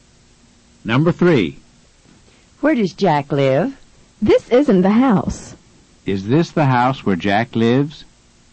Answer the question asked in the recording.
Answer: No, it isn't.